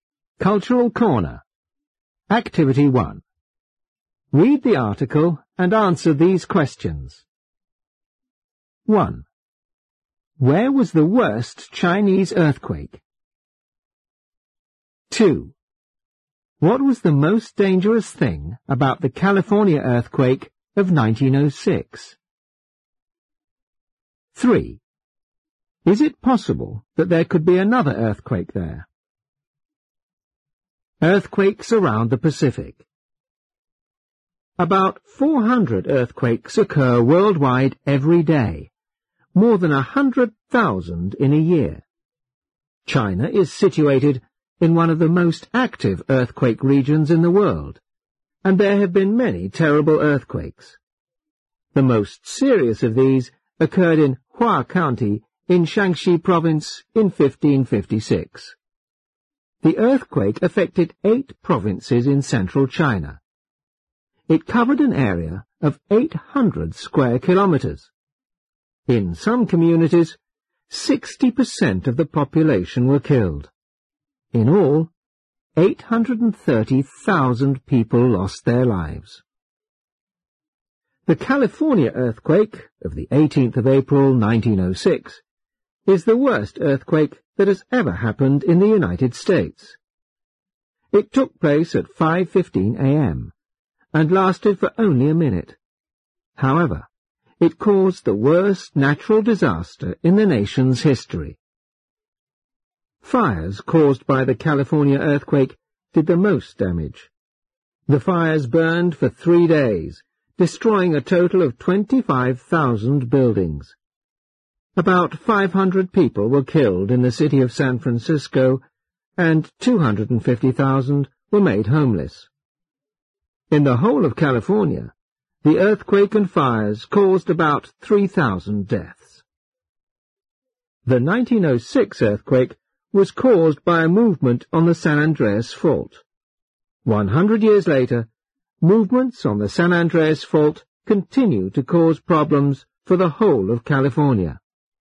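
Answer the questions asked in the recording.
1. In Hua County, Shaanxi Province (1556)
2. The fires caused by the earthquake
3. Yes, movements on the San Andreas Fault continue to cause problems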